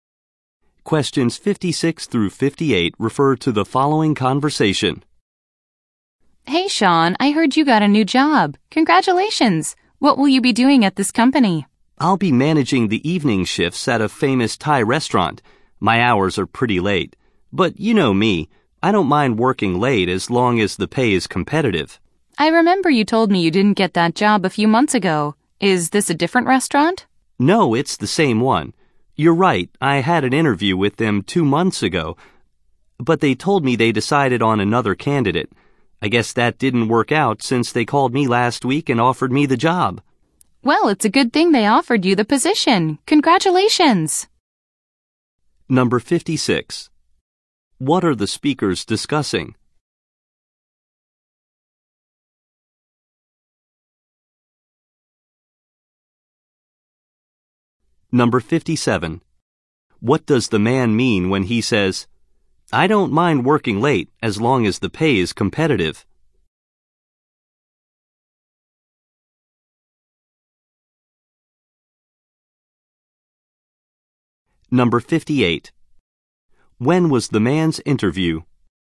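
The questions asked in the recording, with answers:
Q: What are the speakers discussing?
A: The man's new job

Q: When was the man's interview?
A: Two months ago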